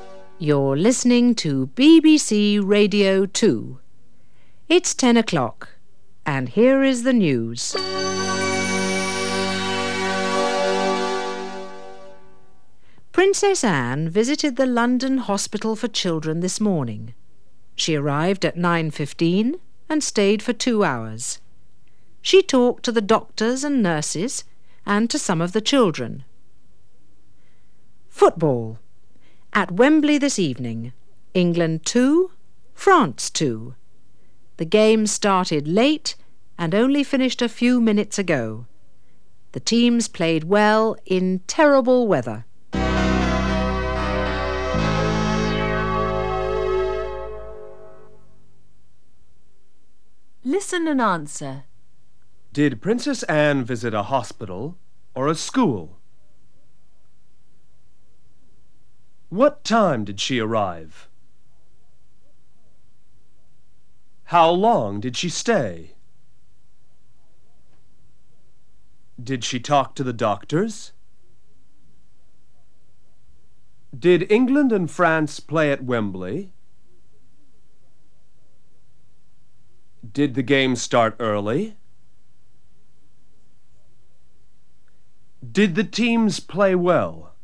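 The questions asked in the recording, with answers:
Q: Did Princess Anne visit a hospital or a school?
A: A hospital

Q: What time did she arrive?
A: At 9:15

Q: How long did she stay?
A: For 2 hours

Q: Did she talk to the doctors?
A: Yes, she did

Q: Did England and France play at Wembley?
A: Yes, they did

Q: Did the game start early?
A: No, it started late

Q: Did the teams play well?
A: Yes, they did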